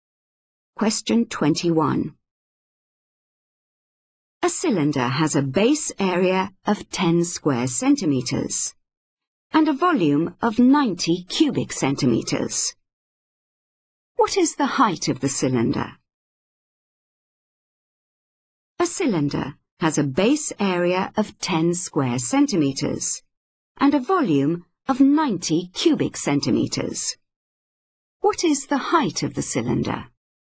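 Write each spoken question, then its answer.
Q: What is the height of the cylinder?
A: 9 centimeters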